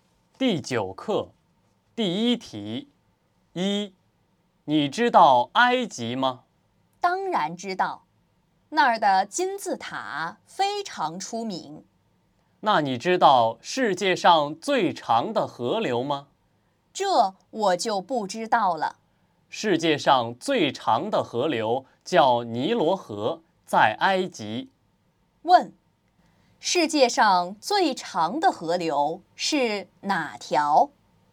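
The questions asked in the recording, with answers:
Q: 世界上最长的河流是哪条?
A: 尼罗河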